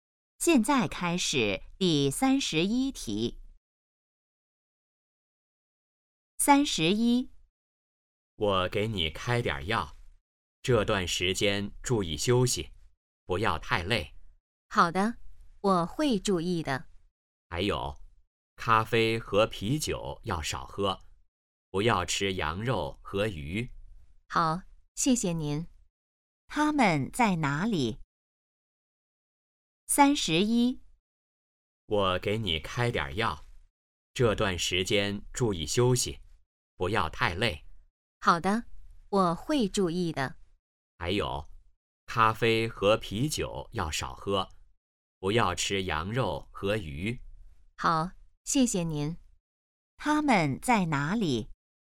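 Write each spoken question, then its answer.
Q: 他们在哪里?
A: 医院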